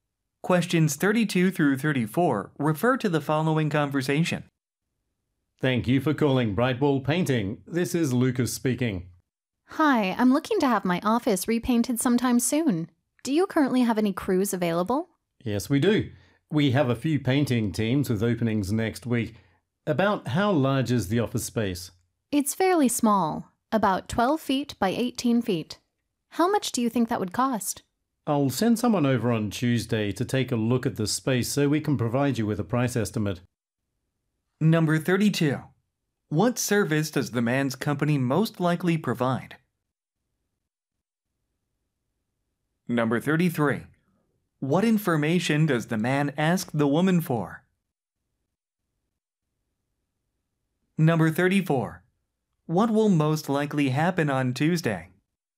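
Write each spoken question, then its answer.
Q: What service does the man's company most likely provide?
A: Painting

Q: What information does the man ask the woman for?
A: The size of the office space

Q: What will most likely happen on Tuesday?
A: Someone will visit to inspect the space and give a price estimate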